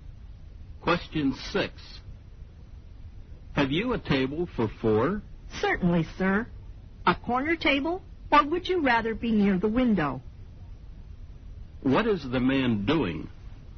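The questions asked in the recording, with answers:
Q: What is the man doing?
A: Asking for a table for four in a restaurant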